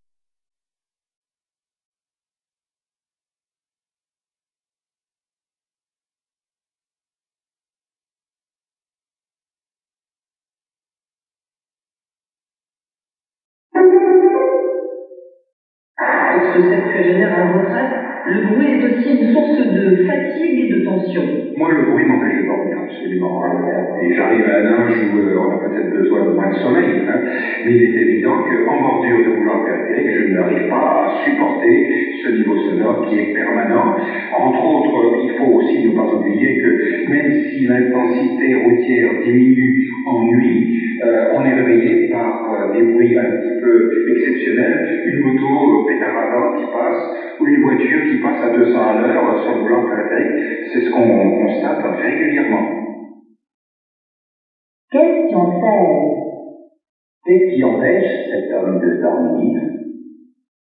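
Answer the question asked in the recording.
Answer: Le bruit de la circulation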